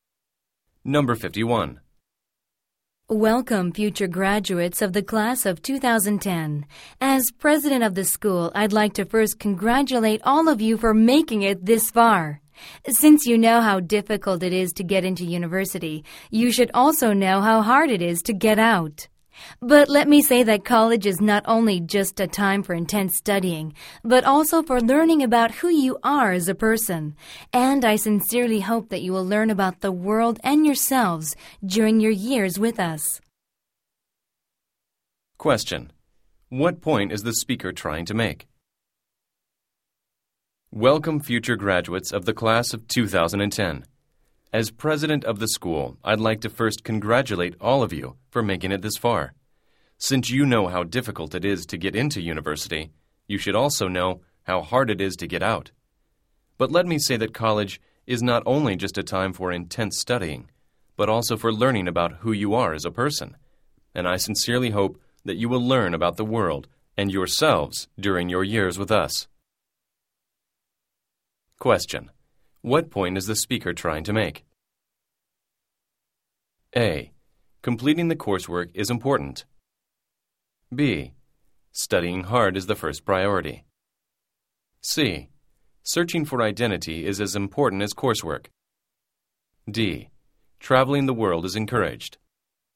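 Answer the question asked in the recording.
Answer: C: Searching for identity is as important as coursework.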